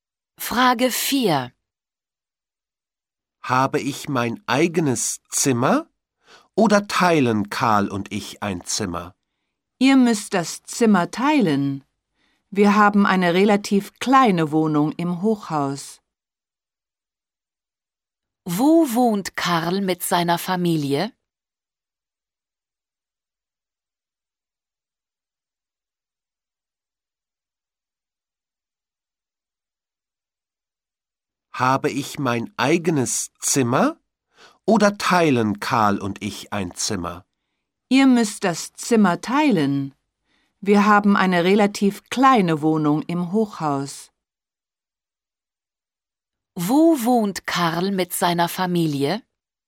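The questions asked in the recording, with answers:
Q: Wo wohnt Karl mit seiner Familie?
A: In einer kleinen Wohnung im Hochhaus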